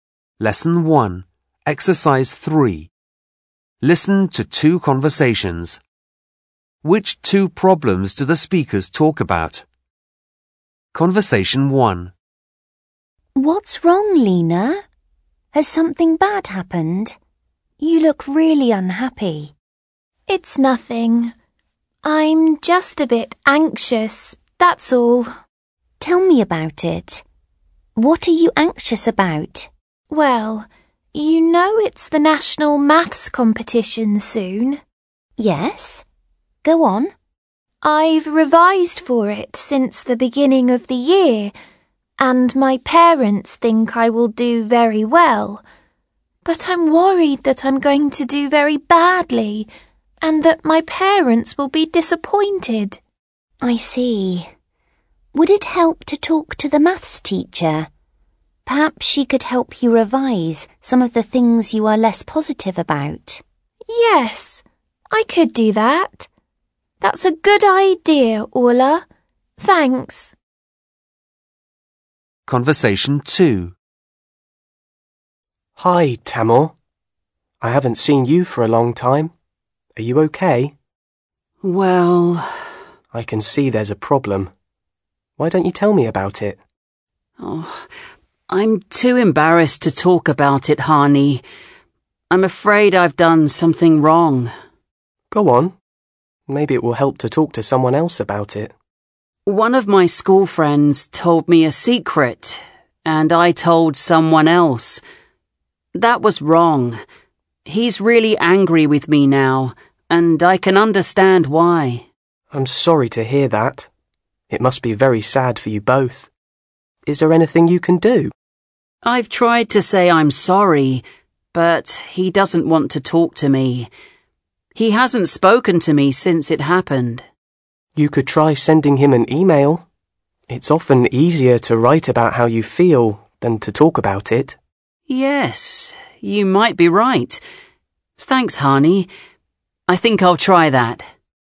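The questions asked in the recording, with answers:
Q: Which two problems do the speakers talk about?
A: Lena is anxious about doing badly in the national maths competition; Tamor told someone a friend's secret and the friend is angry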